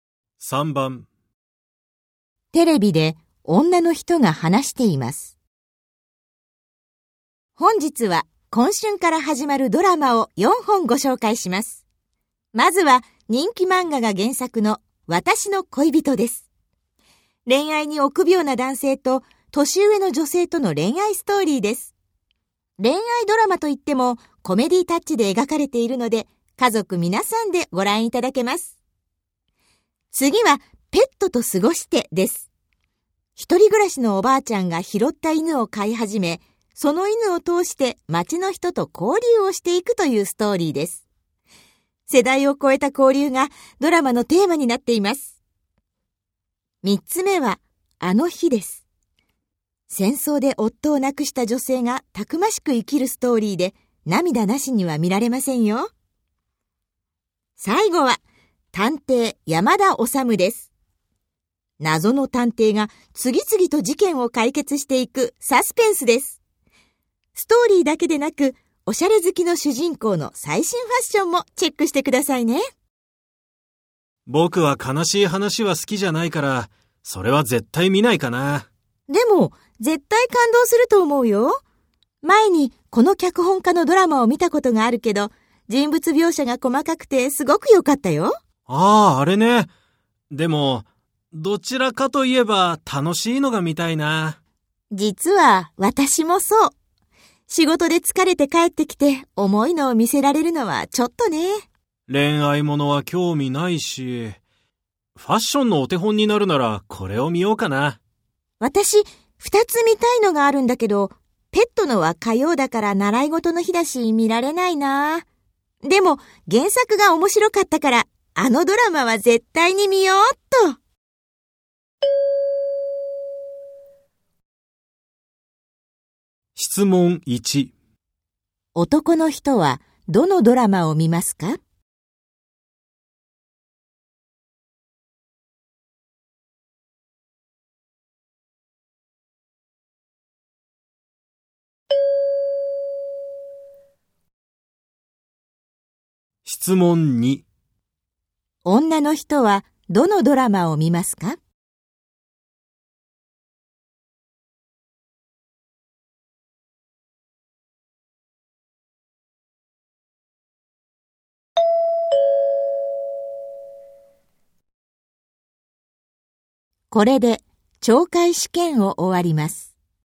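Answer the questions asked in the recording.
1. 探偵山田修
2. 私の恋人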